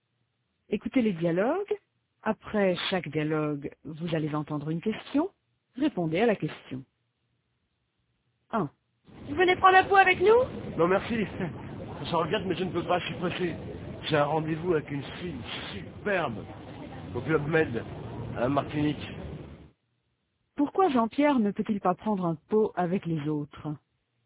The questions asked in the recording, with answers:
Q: Pourquoi Jean-Pierre ne peut-il pas prendre un pot avec les autres?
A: Parce qu'il est pressé.